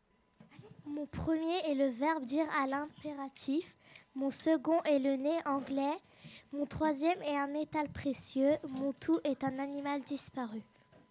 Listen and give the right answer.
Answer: Il s'agissait du dinosaure.